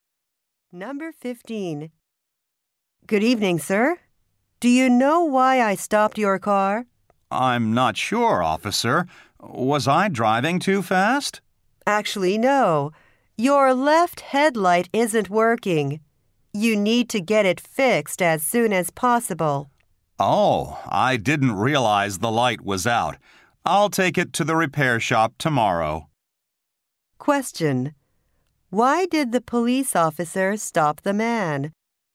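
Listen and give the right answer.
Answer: His left headlight isn't working.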